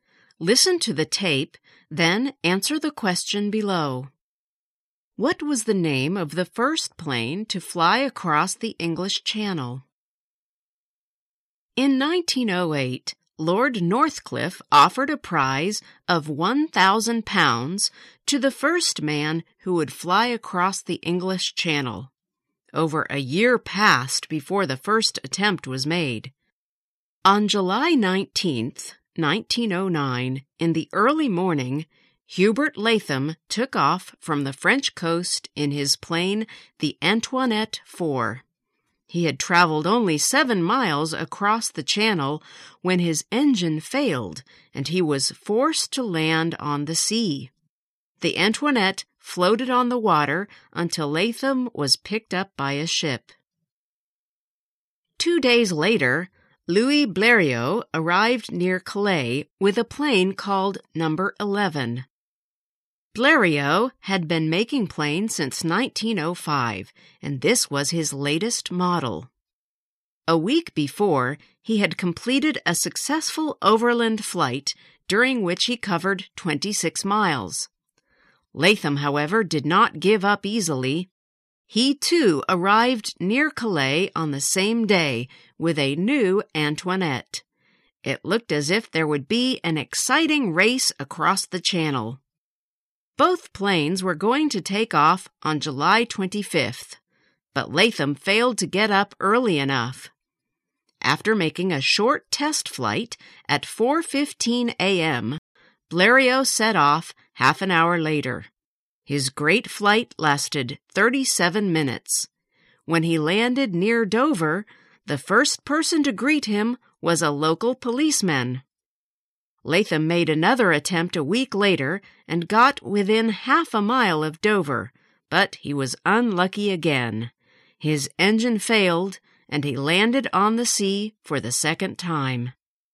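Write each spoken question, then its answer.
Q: What was the name of the first plane to fly across the English Channel?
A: No. 11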